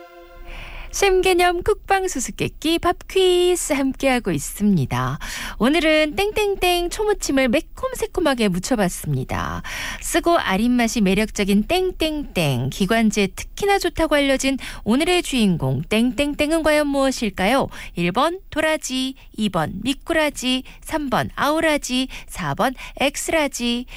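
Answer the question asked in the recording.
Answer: 1: 도라지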